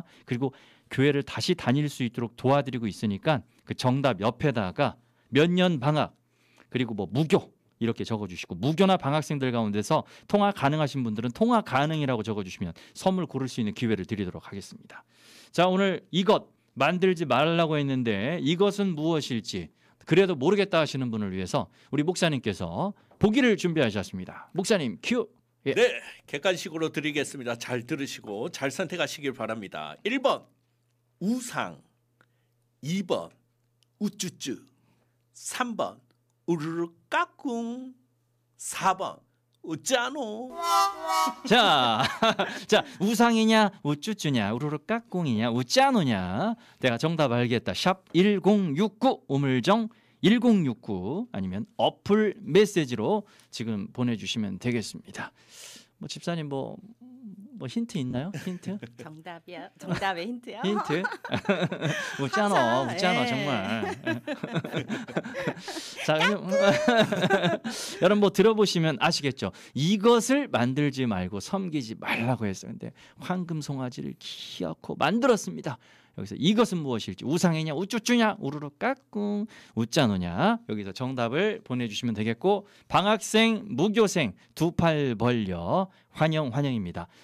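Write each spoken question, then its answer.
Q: 여기서 이것은 무엇일지 우상이냐 우쭈쭈냐 우르르 까꿍 우짜노냐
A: 1: 우상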